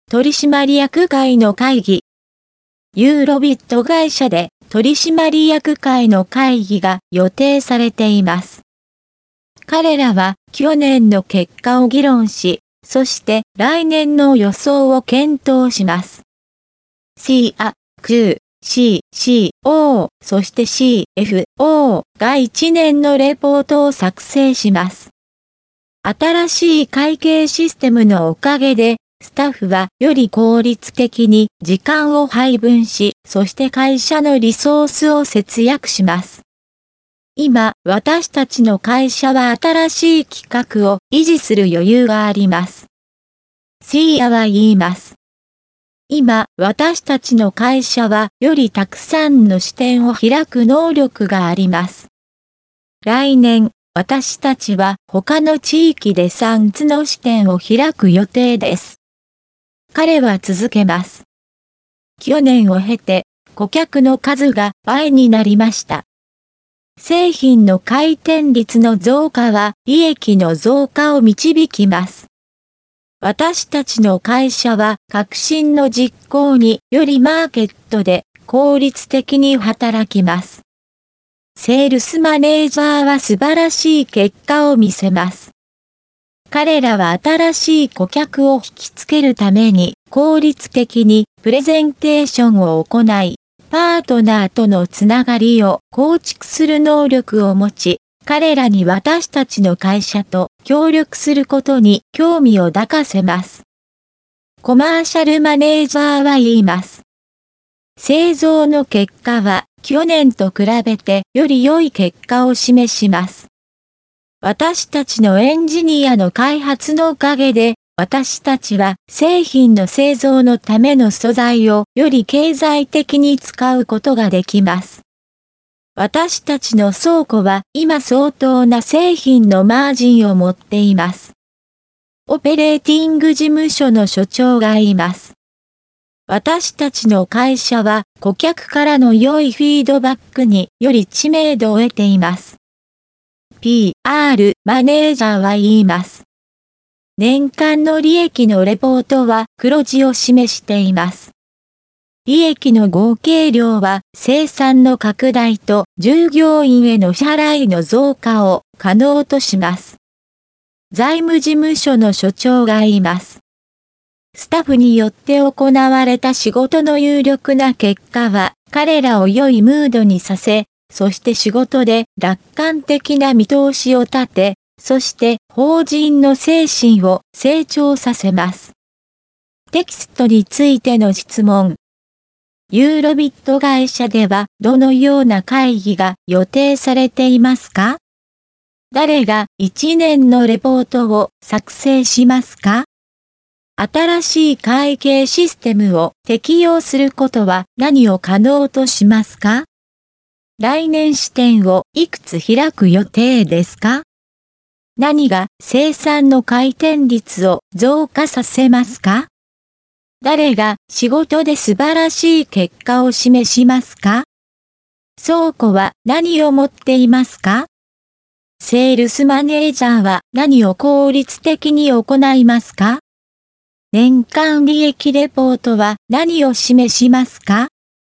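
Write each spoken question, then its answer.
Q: ユーロビット会社ではどのような会議が予定されていますか?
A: 取締役会の会議

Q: 誰が1年のレポートを作成しますか?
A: CIA、CU、CCO、そしてCFO

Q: 新しい会計システムを適用することは何を可能としますか?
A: スタッフがより効率的に時間を配分し、会社のリソースを節約すること

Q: 来年視点をいくつ開く予定ですか?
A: 3つ

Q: 誰が仕事で素晴らしい結果を示しますか?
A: セールスマネージャー

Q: 倉庫は何を持っていますか?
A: 相当な製品のマージン

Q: セールスマネージャーは何を効率的に行いますか?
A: 新しい顧客を引きつけるためのプレゼンテーション

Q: 年間利益レポートは何を示しますか?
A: 黒字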